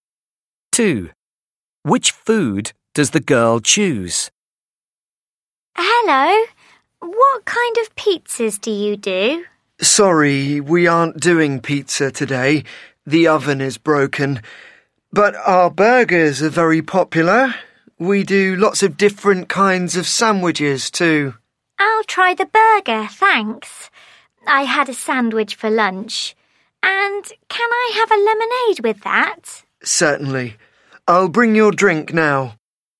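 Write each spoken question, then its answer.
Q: Which food does the girl choose?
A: a burger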